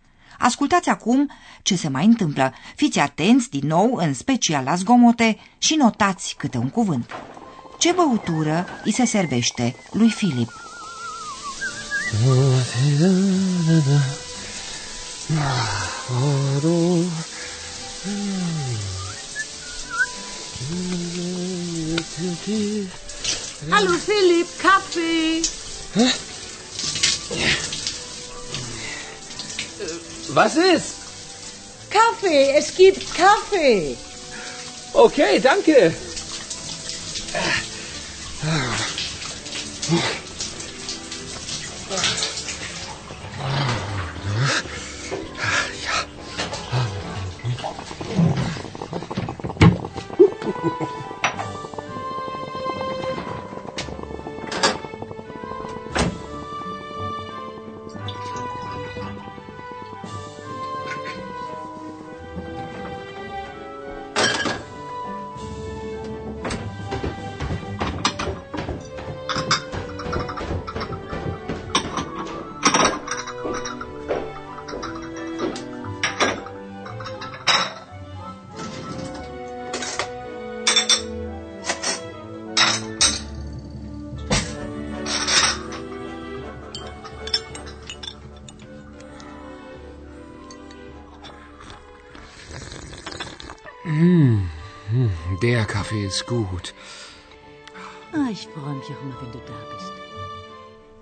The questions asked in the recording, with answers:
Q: Ce băutură îi se servește lui Filip?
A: îl răsfață cu o cafea